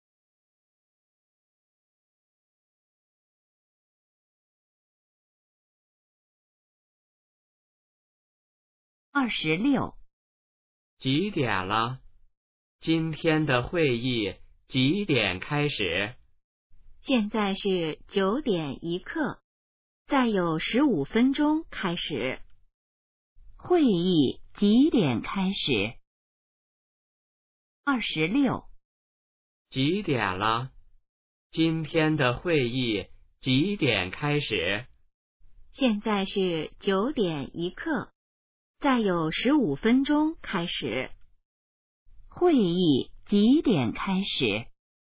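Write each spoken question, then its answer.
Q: 会议几点开始?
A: 9:16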